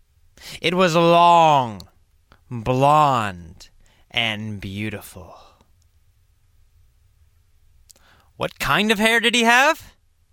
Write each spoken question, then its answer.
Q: What kind of hair did he have?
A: Well, great hair. Long, blonde, beautiful hair.